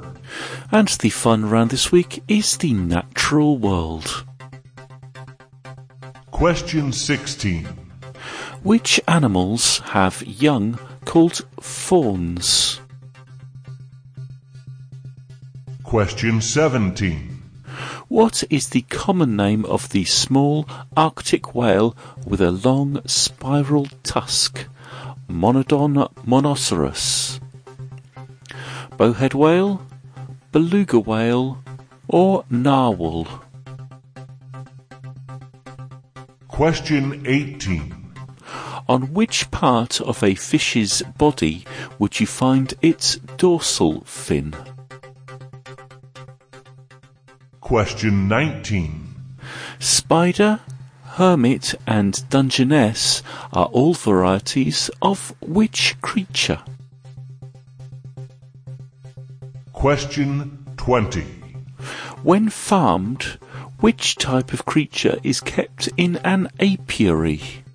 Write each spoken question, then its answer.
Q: Which animals have young called fawns?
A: fawns are young deer.

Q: What is the common name of the small Arctic whale with a long spiral tusk?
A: Monodon monoceros is better known as the narwhal.

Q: On which part of a fish's body would you find its dorsal fin?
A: a fish's dorsal fin is on its back.

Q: Spider, hermit, and dungeness are all varieties of which creature?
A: spider, hermit and dungeness are all crabs.

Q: When farmed, which type of creature is kept in an apiary?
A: you keep bees in an apiary.